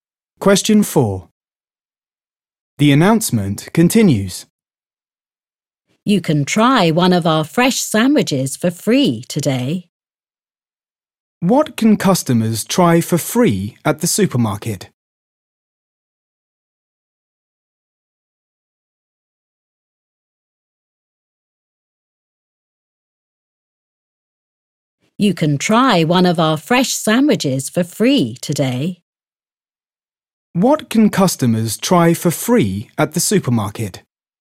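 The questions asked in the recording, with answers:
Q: What can customers try for free at the supermarket?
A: a fresh sandwich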